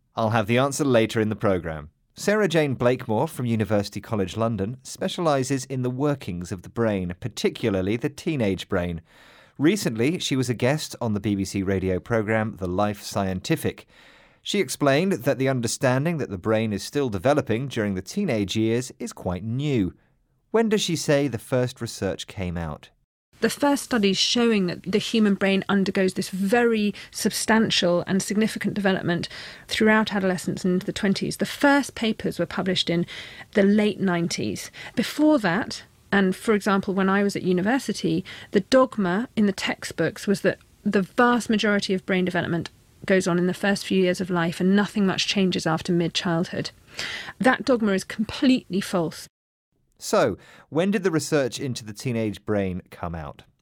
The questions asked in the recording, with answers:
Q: When does she say the first research came out?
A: Surprisingly, it wasn't until the late 1990s.